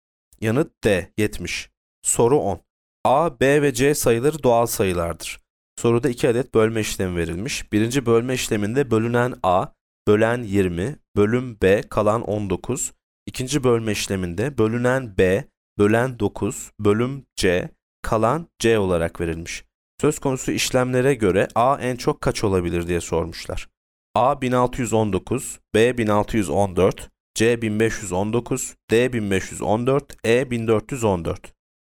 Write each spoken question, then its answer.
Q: Söz konusu işlemlere göre A en çok kaç olabilir diye sormuşlar.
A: Yanıt A 1619.